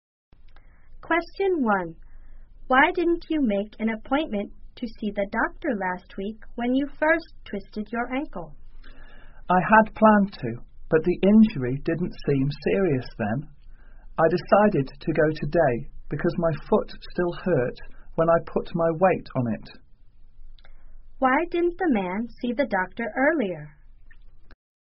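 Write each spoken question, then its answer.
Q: Why didn't the man see the doctor earlier?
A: He didn't think the injury was serious at first.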